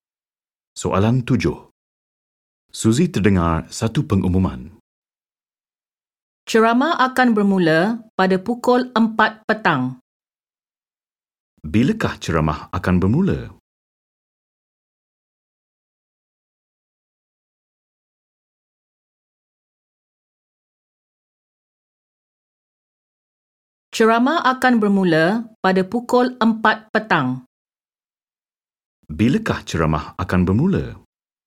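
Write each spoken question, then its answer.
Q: Bilakah ceramah akan bermula?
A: Pukul 4 petang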